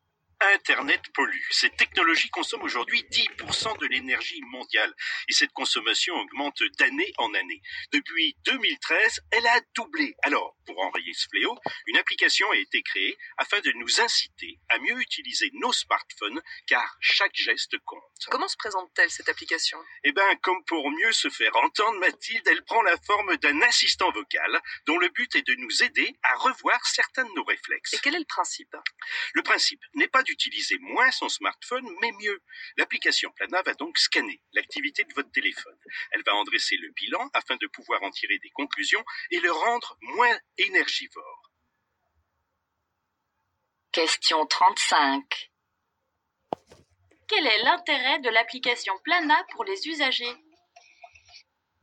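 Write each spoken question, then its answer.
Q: Quel est l'intérêt de l'application Plana pour les usagers ?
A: Les aider à mieux utiliser leur smartphone pour le rendre moins énergivore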